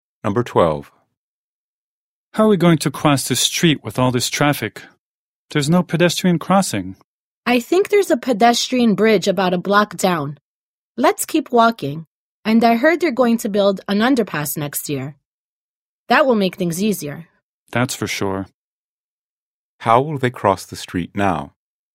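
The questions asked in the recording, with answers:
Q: How will they cross the street now?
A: By using a pedestrian bridge about a block down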